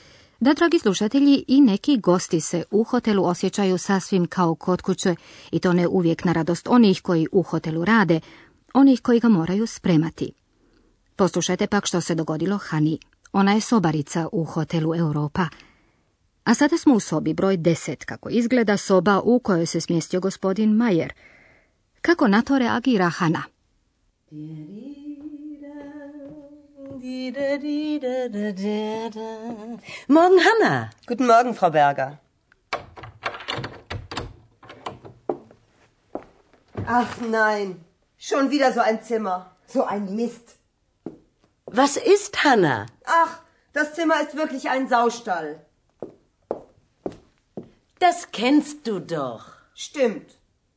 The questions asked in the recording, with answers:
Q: Kako na to reagira Hana?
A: Hanna ulazi u sobu u kojoj izgleda kao u svinjcu, što ju dosta ljuti pa grdi.